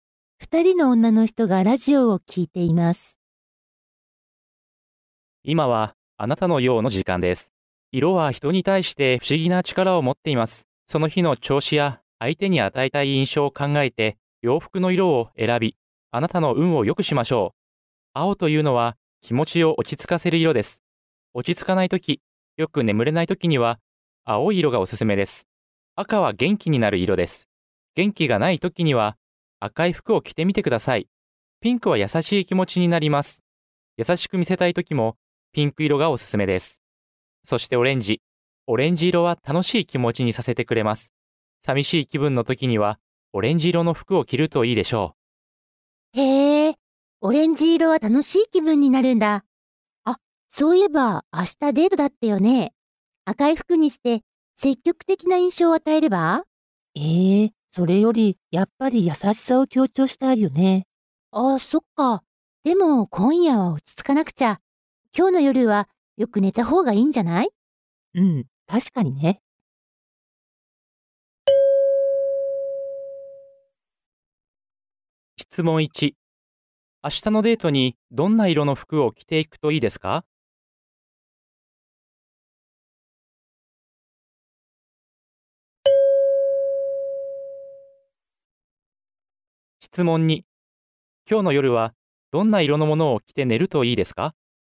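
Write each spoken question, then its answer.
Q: 明日のデートにどんな色の服を着ていくといいですか?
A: ピンク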